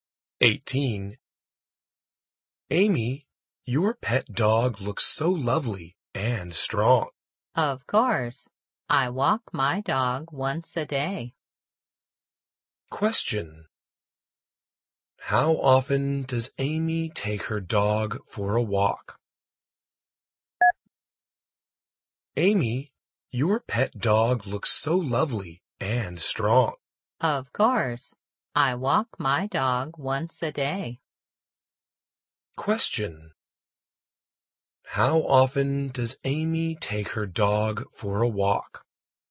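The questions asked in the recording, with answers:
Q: How often does Amy take her dog for a walk?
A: Once a day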